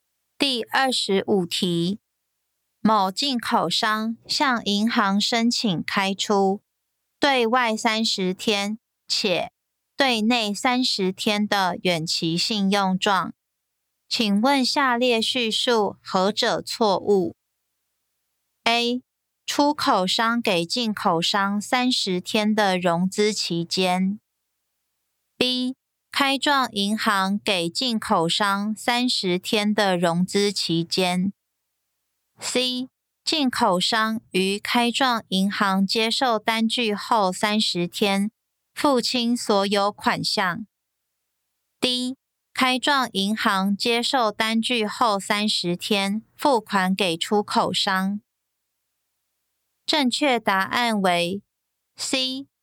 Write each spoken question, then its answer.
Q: 某进口商向银行申请开出对外30天且对内30天的远期信用状,请问下列叙述何者错误 ?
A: 正确答案为 C.